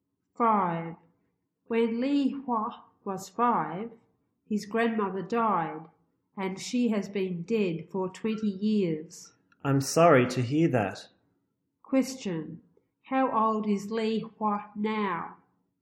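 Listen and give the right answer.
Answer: 25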